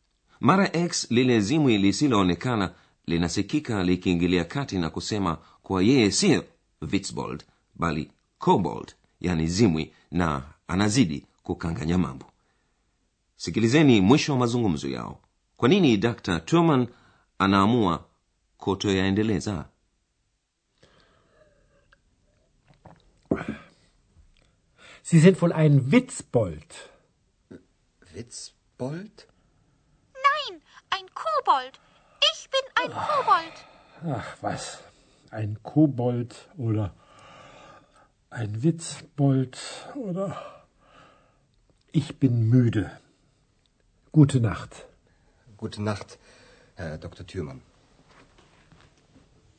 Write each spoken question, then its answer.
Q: kwa nini dr turman anaamua kutoyaendeleza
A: Dr. Thürmann hayaendelezi mazungumzo kwa sababu amechoka.